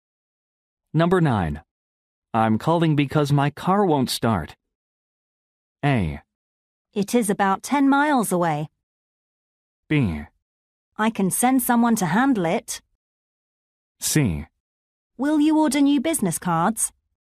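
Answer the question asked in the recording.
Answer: B: I can send someone to handle it.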